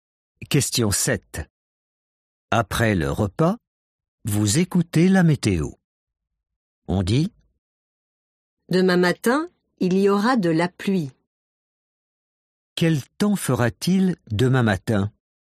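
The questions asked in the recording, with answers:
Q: Quel temps fera-t-il demain matin ?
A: de la pluie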